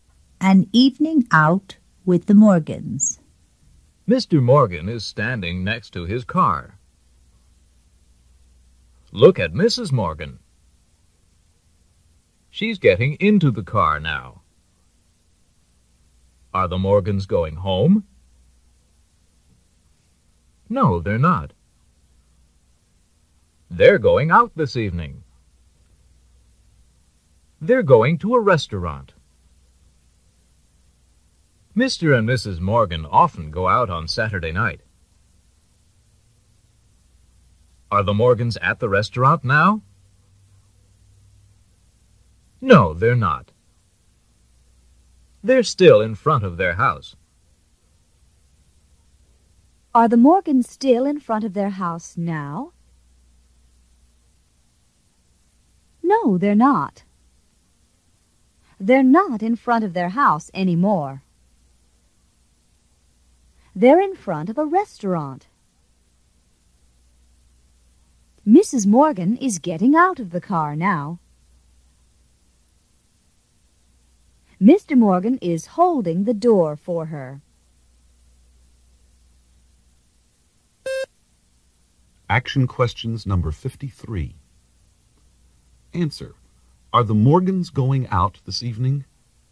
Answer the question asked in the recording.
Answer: Yes, they are.